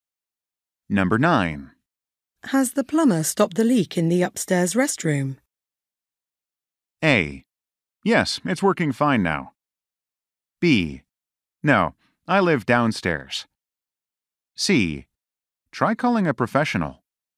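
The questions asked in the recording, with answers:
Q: Has the plumber stopped the leak in the upstairs restroom?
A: A: Yes, it's working fine now.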